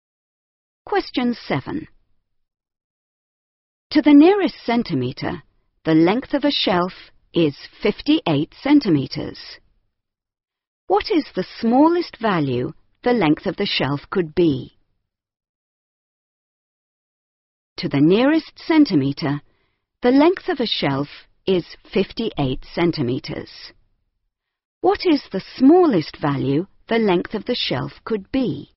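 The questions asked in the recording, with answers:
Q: What is the smallest value the length of the shelf could be?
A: 57.5 centimetres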